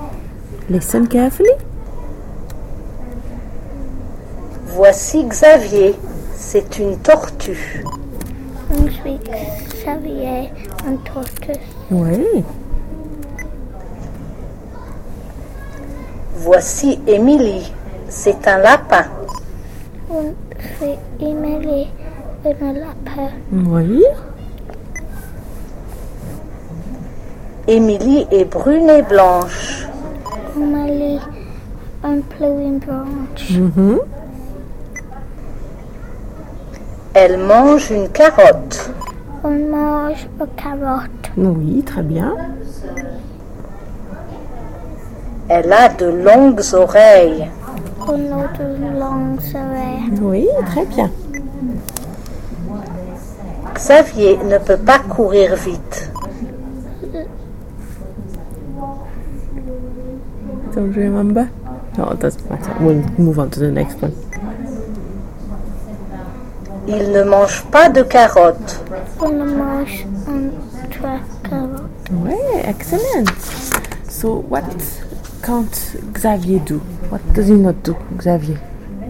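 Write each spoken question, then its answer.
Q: So, what can't Xavier do?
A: Run fast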